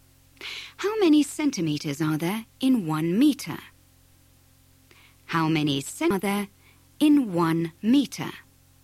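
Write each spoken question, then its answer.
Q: How many centimeters are there in 1 meter?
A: 100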